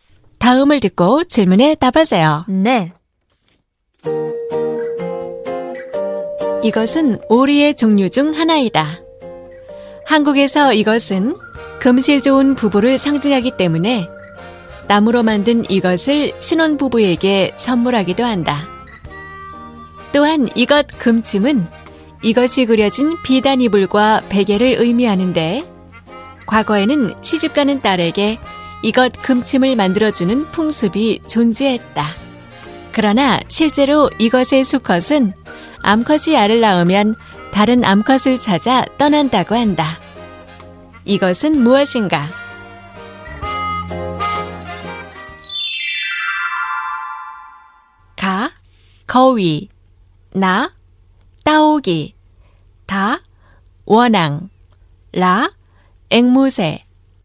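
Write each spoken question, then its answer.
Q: 이것은 무엇인가?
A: 다: 원앙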